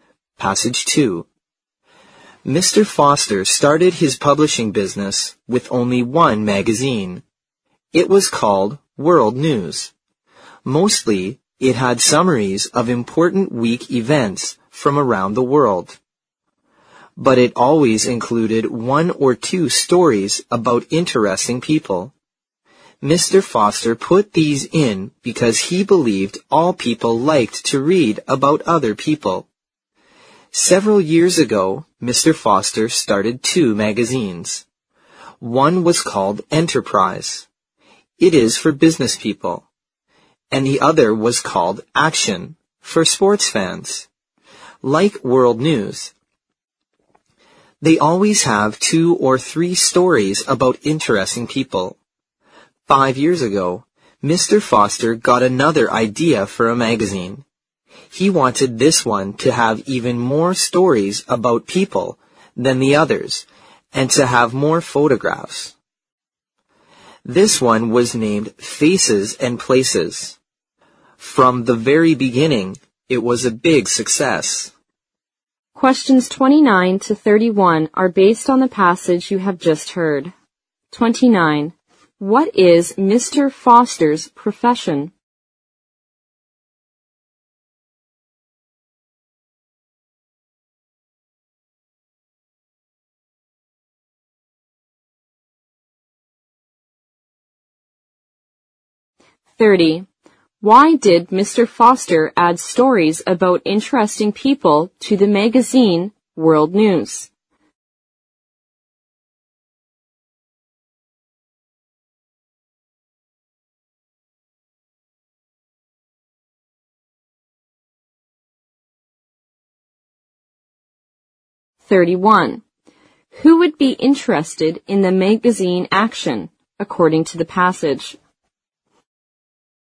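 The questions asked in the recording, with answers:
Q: What is Mr. Foster's profession?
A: A publisher

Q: Why did Mr. Foster add stories about interesting people to the magazine World News?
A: He believed all people liked to read about other people

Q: Who would be interested in the magazine Action, according to the passage?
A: Sports fans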